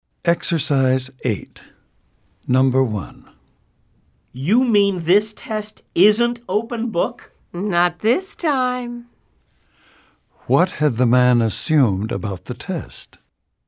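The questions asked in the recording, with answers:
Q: What had the man assumed about the test?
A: That it would be open book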